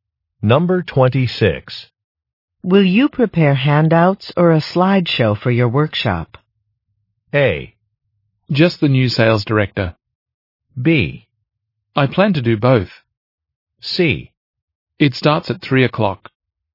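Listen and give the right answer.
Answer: B: I plan to do both.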